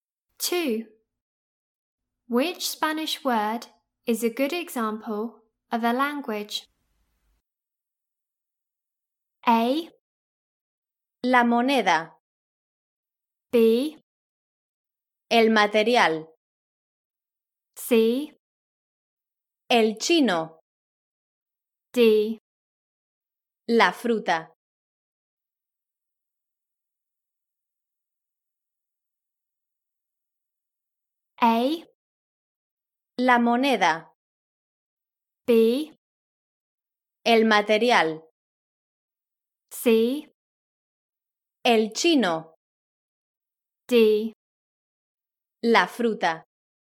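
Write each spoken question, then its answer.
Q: Which Spanish word is a good example of a language?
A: C: El chino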